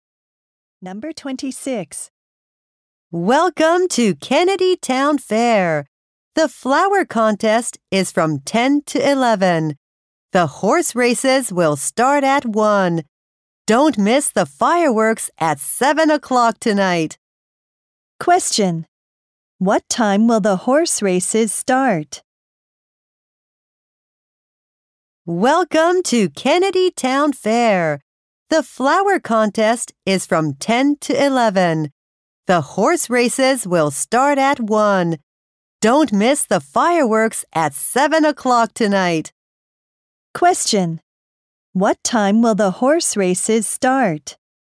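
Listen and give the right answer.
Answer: At 1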